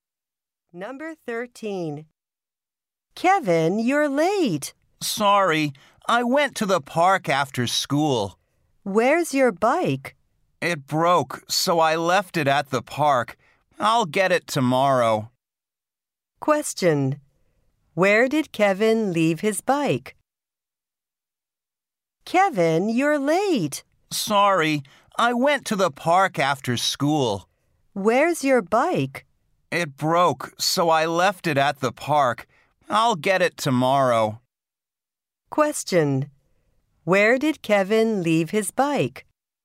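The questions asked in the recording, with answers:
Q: Where did Kevin leave his bike?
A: At the park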